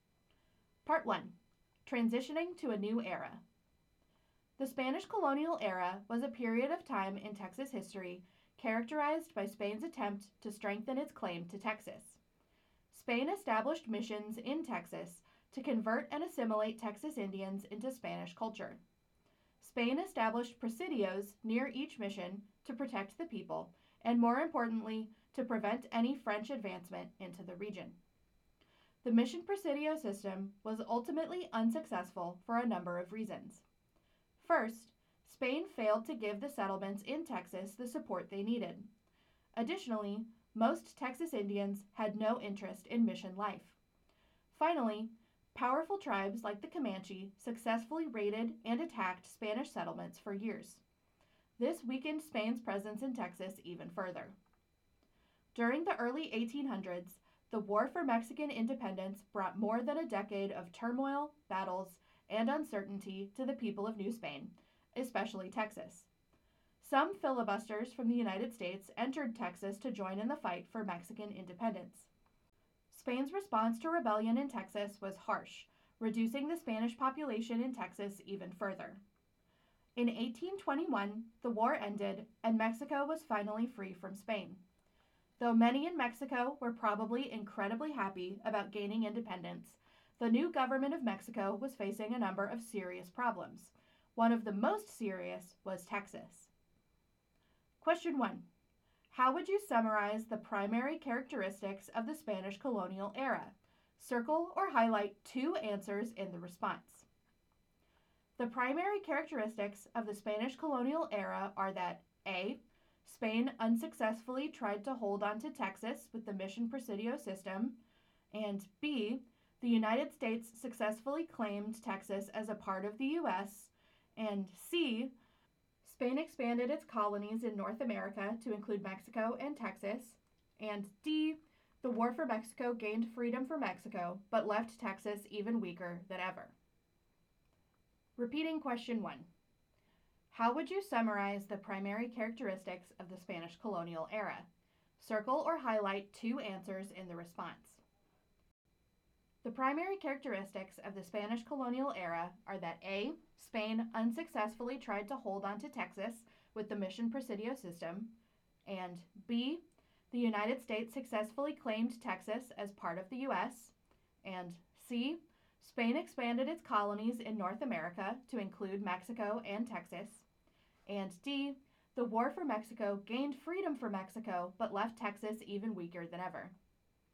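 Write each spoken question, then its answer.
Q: How would you summarize the primary characteristics of the Spanish colonial era?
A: A: Spain unsuccessfully tried to hold on to Texas with the mission presidio system; D: The War for Mexico gained freedom for Mexico, but left Texas even weaker than ever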